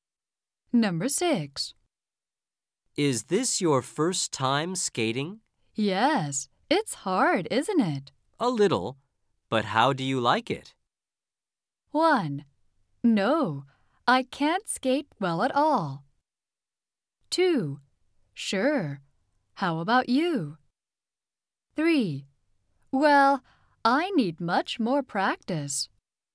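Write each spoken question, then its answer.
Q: A little, but how do you like it?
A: 3: Well, I need much more practice.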